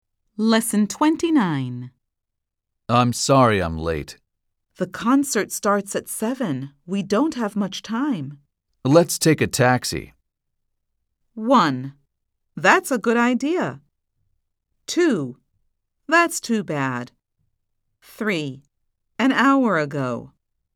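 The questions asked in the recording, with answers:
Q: Let's take a taxi.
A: 1: That's a good idea.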